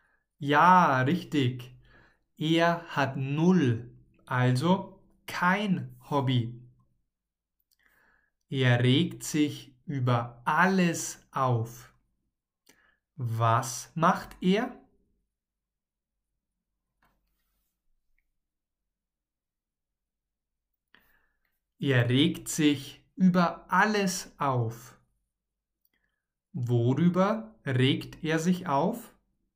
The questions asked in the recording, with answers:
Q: Worüber regt er sich auf?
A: Über alles. Patrick regt sich über alles auf.